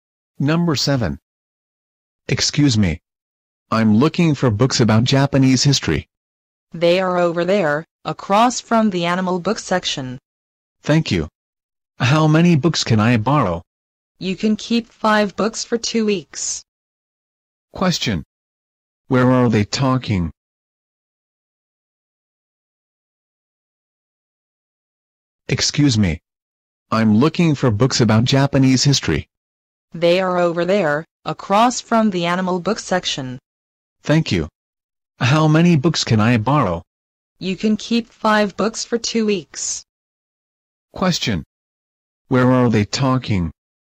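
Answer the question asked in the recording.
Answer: At a library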